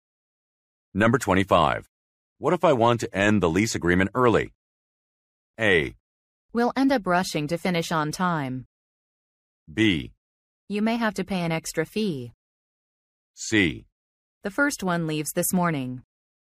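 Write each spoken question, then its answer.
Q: What if I want to end the lease agreement early?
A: B: You may have to pay an extra fee.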